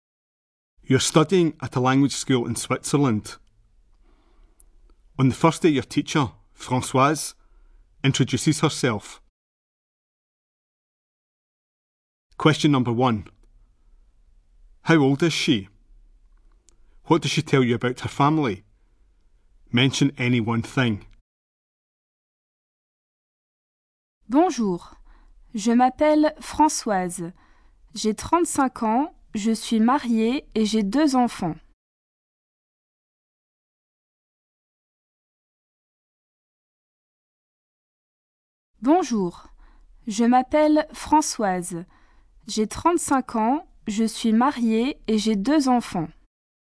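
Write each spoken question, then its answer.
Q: How old is she?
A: 35

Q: What does she tell you about her family?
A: She is married / has 2 children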